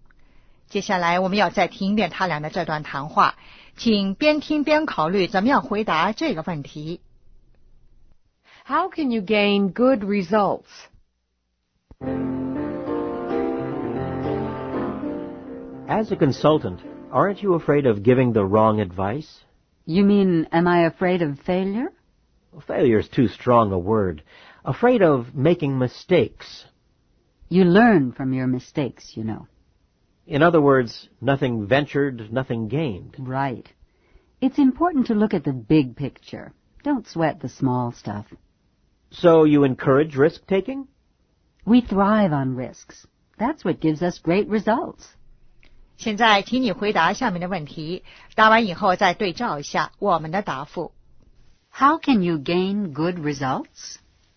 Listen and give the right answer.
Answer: Take risks.